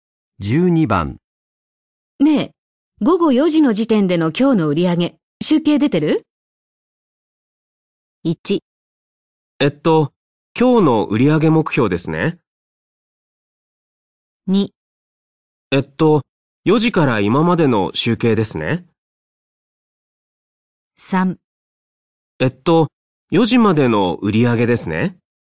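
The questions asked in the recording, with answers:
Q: ねえ、午後4時の時点での今日の売り上げ、集計出て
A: 3: えっと、4時までの売り上げですね。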